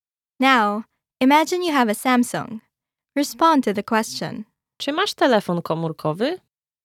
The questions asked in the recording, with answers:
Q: Czy masz telefon komórkowy?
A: Tak, mam Samsunga.